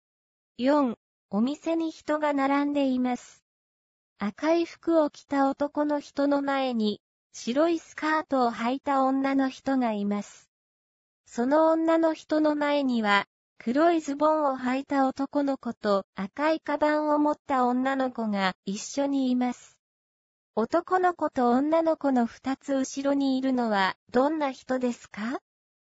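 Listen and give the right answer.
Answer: 赤い服を着た男の人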